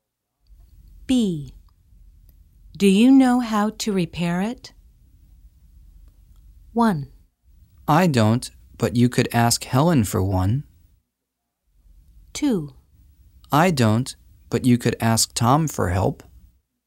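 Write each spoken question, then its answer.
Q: Do you know how to repair it?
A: 2: I don't, but you could ask Tom for help.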